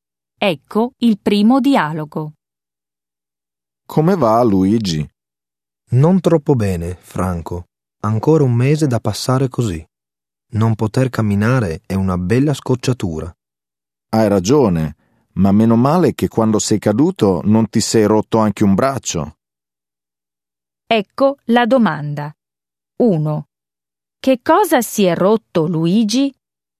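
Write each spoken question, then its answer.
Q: Che cosa si è rotto, Luigi?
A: La gamba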